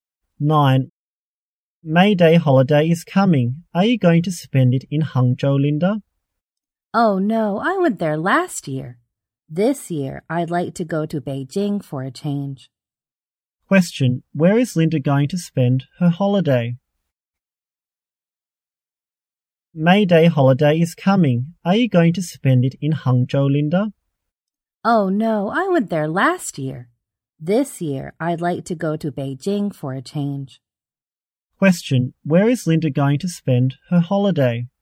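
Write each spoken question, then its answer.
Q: where is Linda going to spend her holiday?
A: In Beijing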